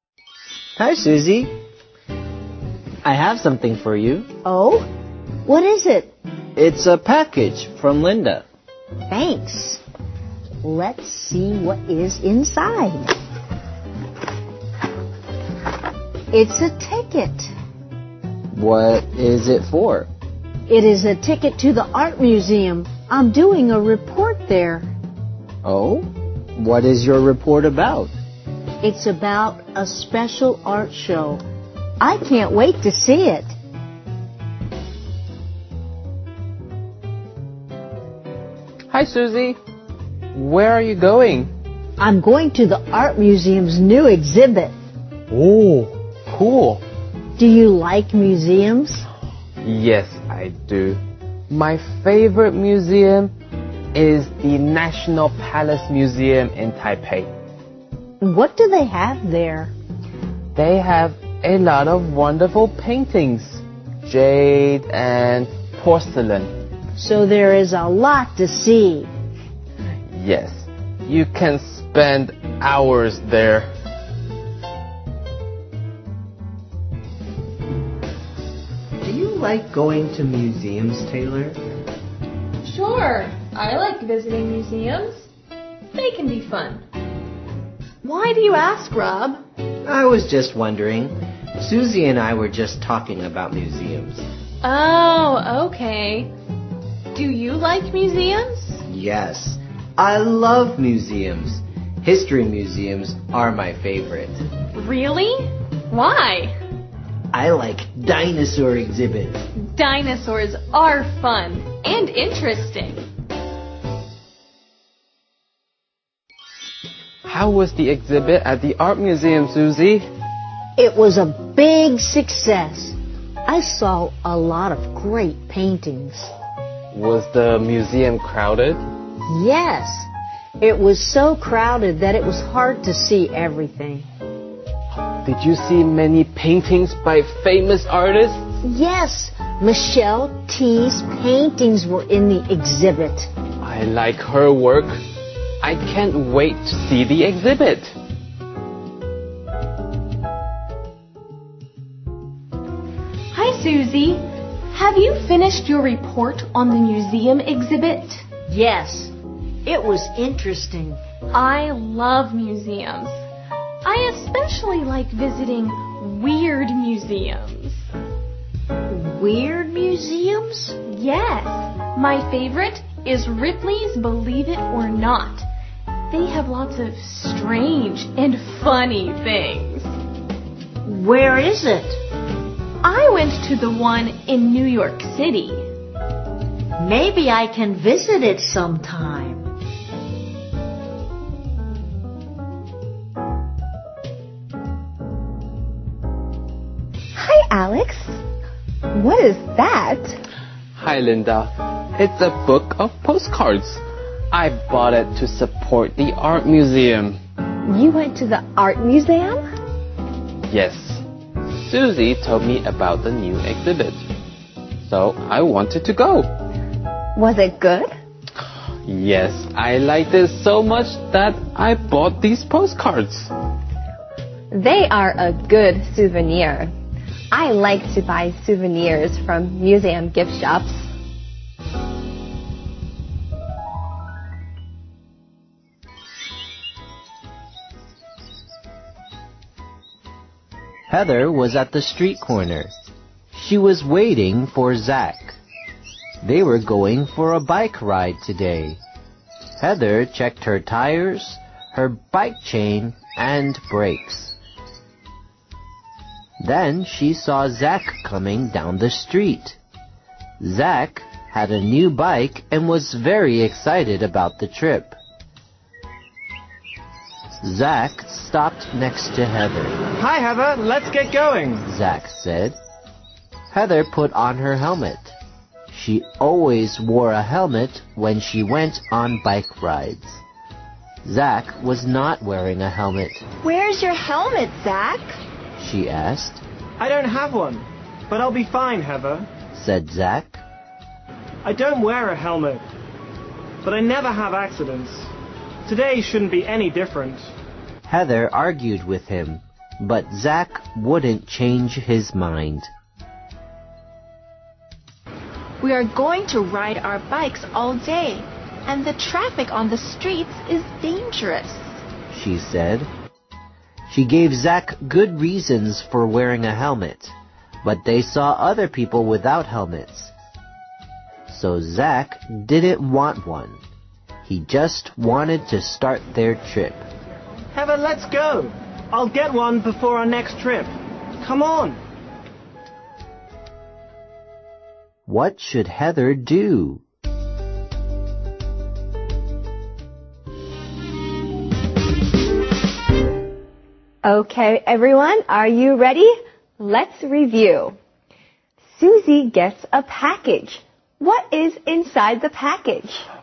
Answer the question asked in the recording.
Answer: Oh, a ticket.